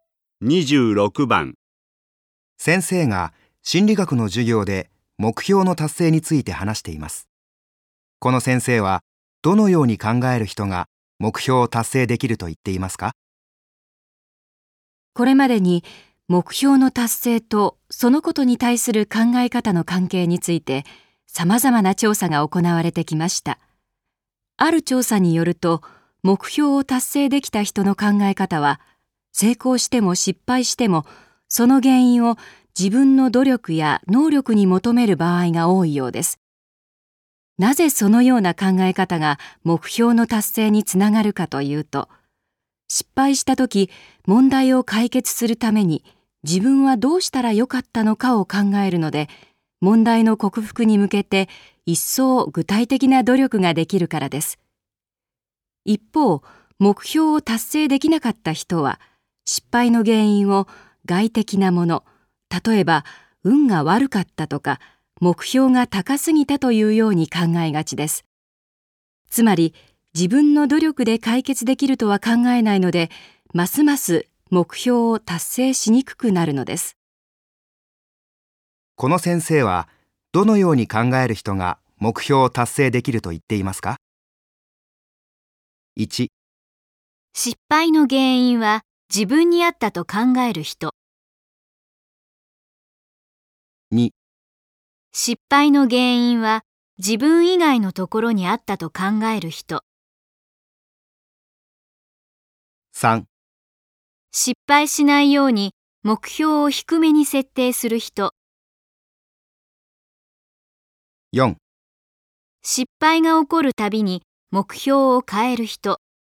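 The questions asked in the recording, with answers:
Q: この先生は、どのように考える人が目標を達成できると言っていますか?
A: 1: 失敗の原因は自分にあったと考える人。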